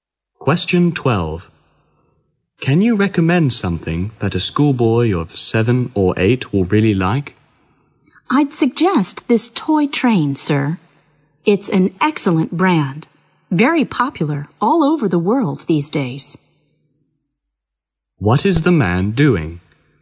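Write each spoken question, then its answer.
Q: What is the man doing?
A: Shopping for a toy for a 7- or 8-year-old boy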